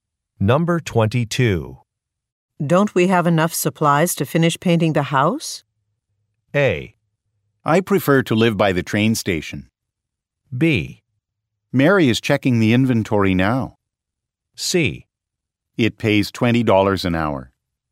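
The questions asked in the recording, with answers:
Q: Don't we have enough supplies to finish painting the house?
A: B: Mary is checking the inventory now.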